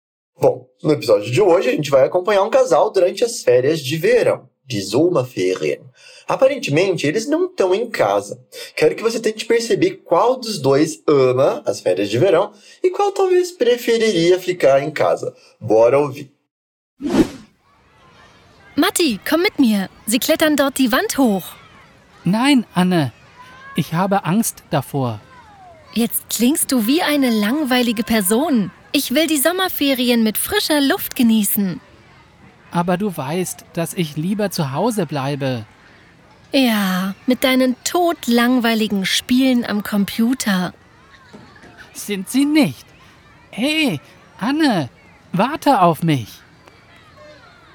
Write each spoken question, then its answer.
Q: Quero que você tente perceber qual dos dois ama as férias de verão e qual talvez preferiria ficar em casa.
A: Deu para entender que a mulher é que tá toda empolgada com as atividades das férias, enquanto o homem tá um pouquinho preguiçoso.